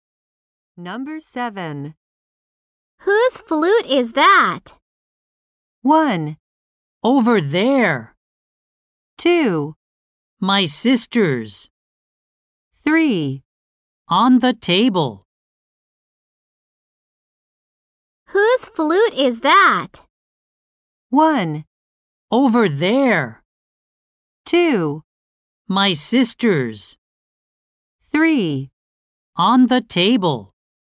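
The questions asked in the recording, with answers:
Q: Whose flute is that?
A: 2: My sister's.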